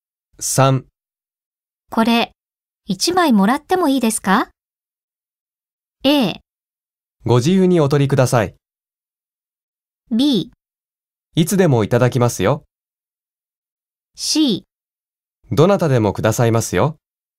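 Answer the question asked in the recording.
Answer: A: ご自由にお取りください。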